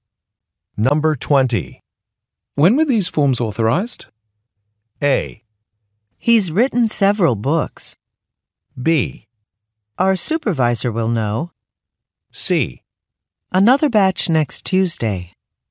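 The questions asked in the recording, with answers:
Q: When were these forms authorized?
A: B: Our supervisor will know.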